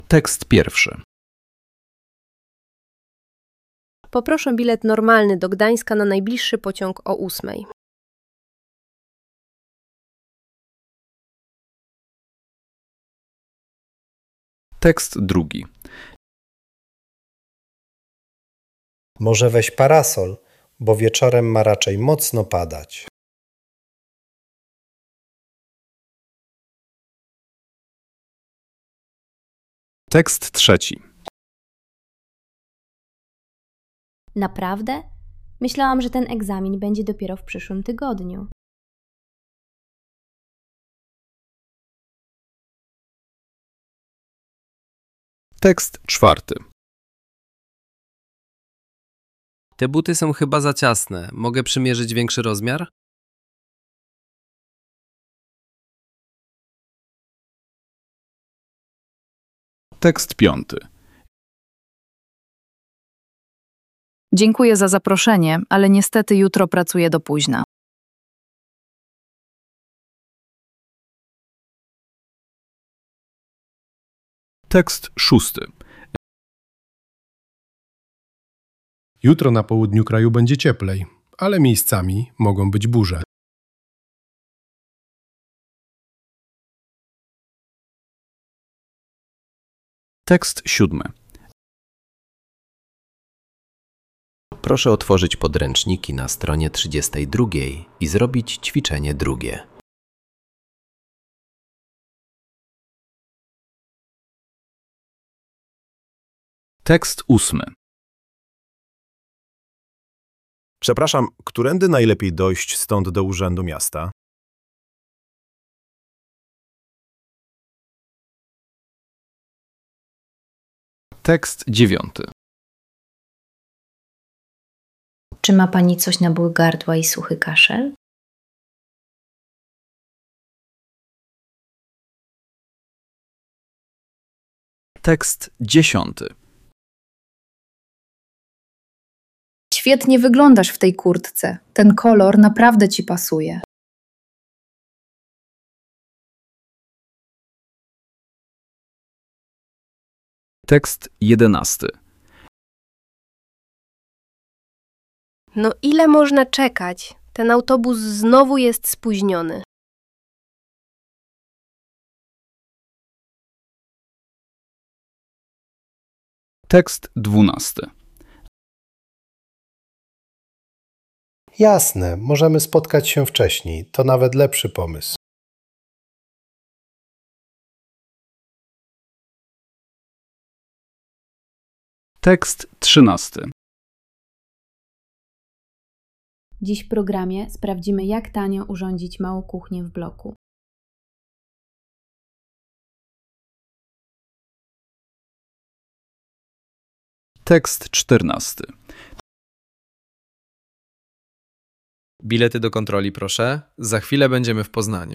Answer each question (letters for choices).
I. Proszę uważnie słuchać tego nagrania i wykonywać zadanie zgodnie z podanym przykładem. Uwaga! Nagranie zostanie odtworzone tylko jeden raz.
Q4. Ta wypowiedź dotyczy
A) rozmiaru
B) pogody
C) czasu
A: A

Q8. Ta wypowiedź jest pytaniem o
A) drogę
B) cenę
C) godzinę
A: A

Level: B1